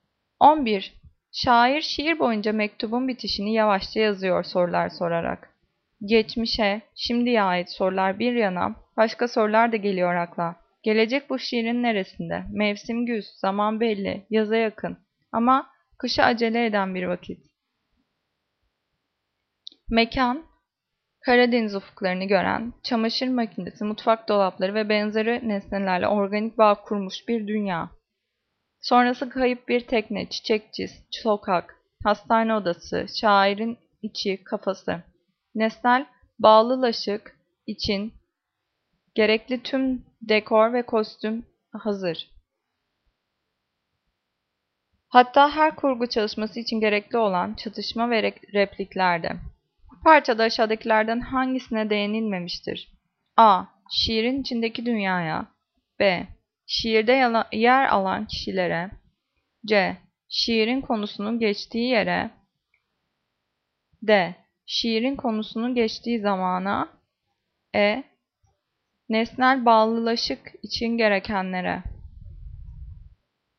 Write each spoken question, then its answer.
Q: Bu parçada aşağıdakilerden hangisine değinilmemiştir?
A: Cevap B. Şiirde yer alan kişilere.